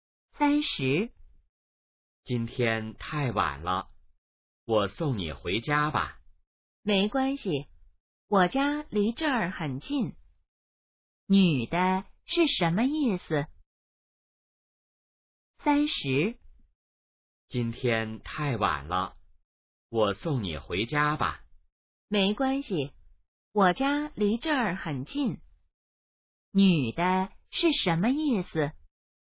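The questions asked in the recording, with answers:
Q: 女的是什么意思?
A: 不用送,她家很近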